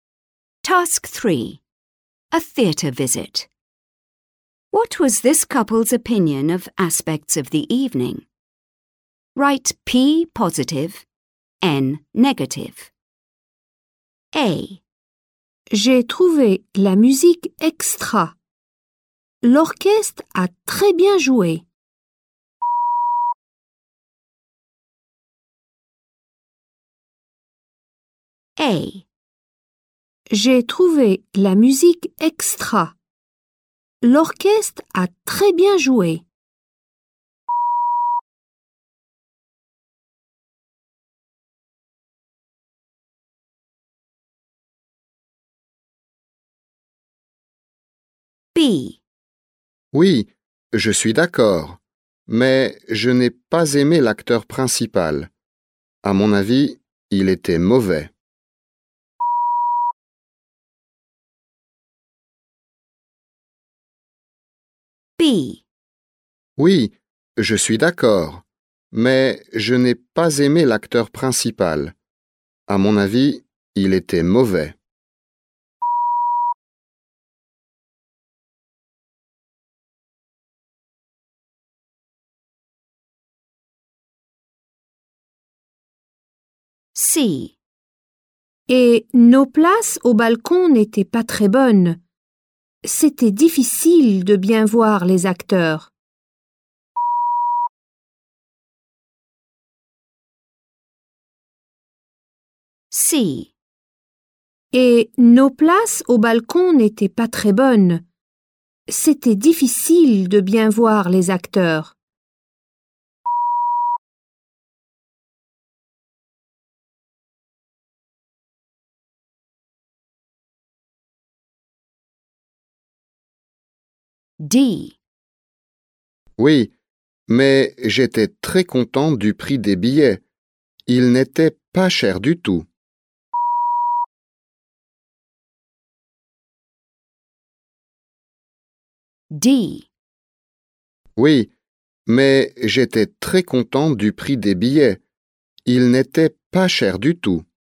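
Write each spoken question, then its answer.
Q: What was this couple's opinion of aspects of the evening?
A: P (positive): the music

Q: What was this couple's opinion of aspects of the evening?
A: N (negative): the main actor

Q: What was this couple's opinion of aspects of the evening?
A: N (negative): the balcony seats

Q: What was this couple's opinion of aspects of the evening?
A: P (positive): the ticket prices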